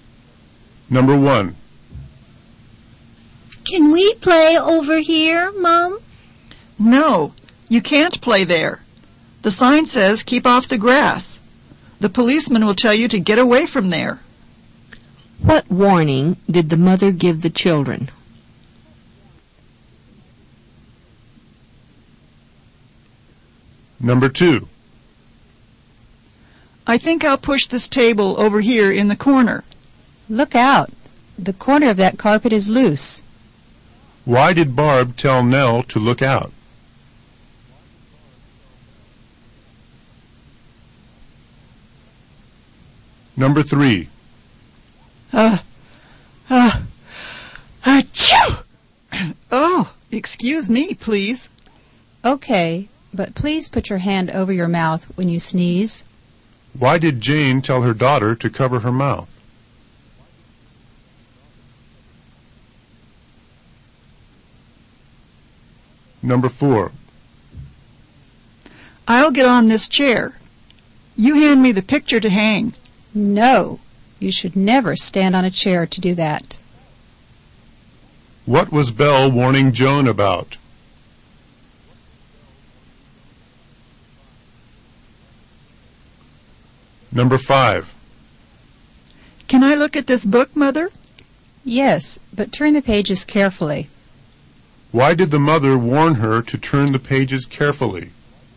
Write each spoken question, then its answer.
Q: What warning did the mother give the children?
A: The mother warned the child to stay off the grass.

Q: Why did Barb tell Nell to look out?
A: Barb told Nell to look out so she wouldn't catch her heel in the carpet.

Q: What was Belle warning Joan about?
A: Belle was warning Joan about the danger of falling from a chair.